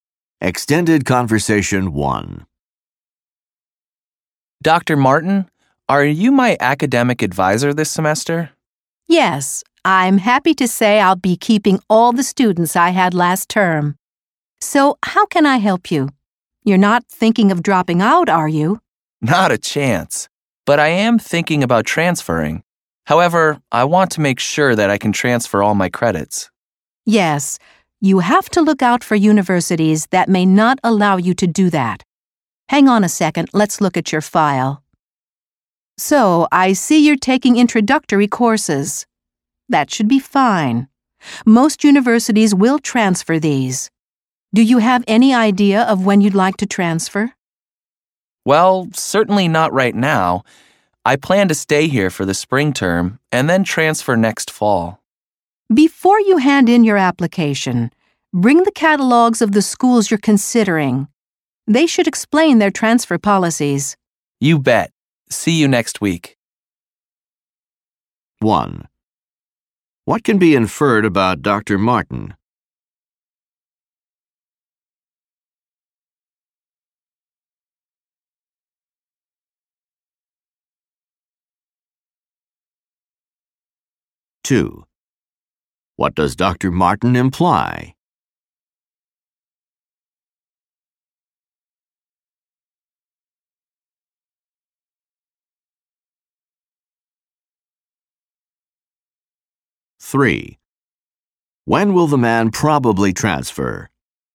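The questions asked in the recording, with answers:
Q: What can be inferred about Dr. Martin?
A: He was the man's academic advisor last term too

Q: When will the man probably transfer?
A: Next fall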